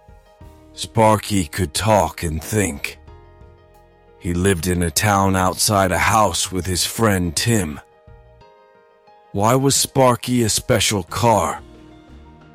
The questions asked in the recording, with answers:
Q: Why was Sparky a special car?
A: Because he could talk and think.